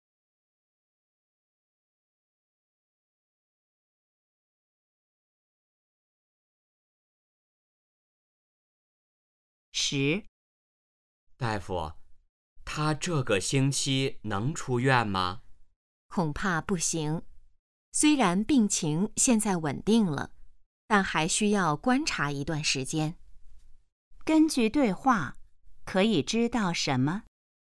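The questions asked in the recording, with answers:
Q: 根据对话,可以知道什么?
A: 病人这个星期还不能出院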